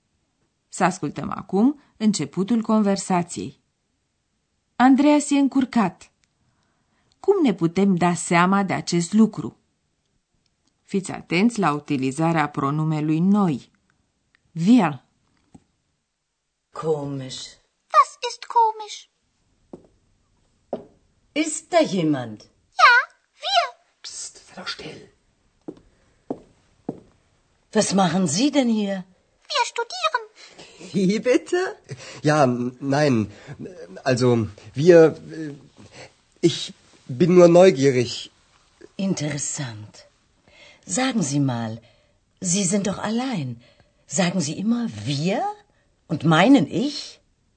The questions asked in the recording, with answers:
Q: Andreas e încurcat. Cum ne putem da seama de acest lucru?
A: Auzind vocea lui Andreas și felul cum se bâlbâie, v-ați dat seama că e încurcat.